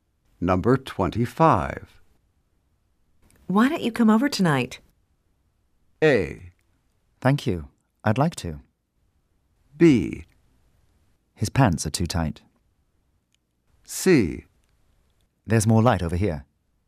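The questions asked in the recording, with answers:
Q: Why don't you come over tonight?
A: A: Thank you. I'd like to.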